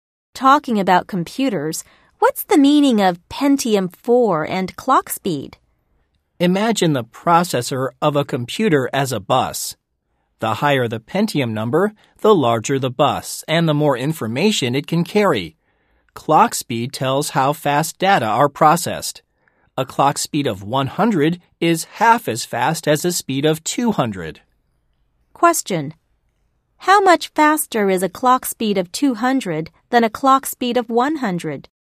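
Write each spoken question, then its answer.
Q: How much faster is a clock speed of 200 than a clock speed of 100?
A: Twice as fast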